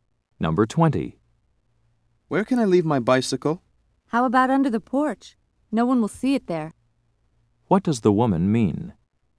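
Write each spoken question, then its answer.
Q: What does the woman mean?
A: He should leave the bicycle under the porch, where it will be hidden.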